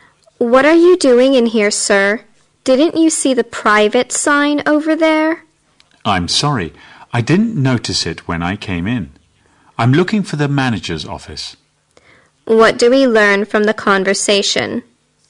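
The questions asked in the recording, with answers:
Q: What do we learn from the conversation?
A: The man went into a private area by mistake while looking for the manager's office.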